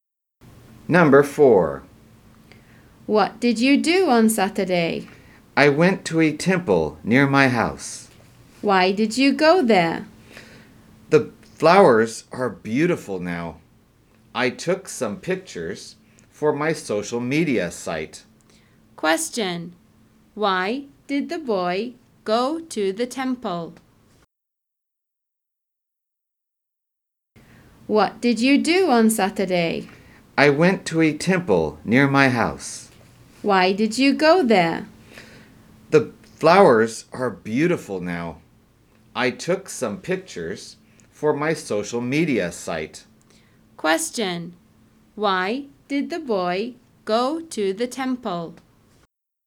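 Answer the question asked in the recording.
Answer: To take pictures of the beautiful flowers for his social media site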